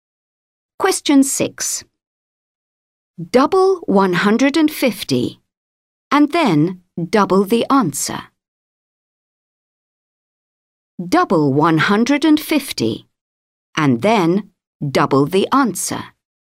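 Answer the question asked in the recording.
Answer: 600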